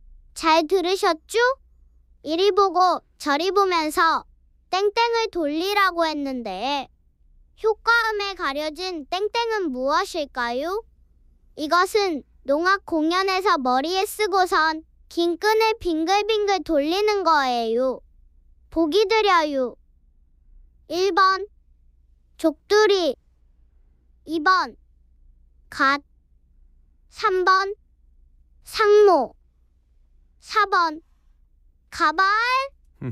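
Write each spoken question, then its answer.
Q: 이리 보고 저리 보면서 땡땡을 돌리라고 했는데 효과음에 가려진 땡땡은 무엇일까요?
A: 3번: 상모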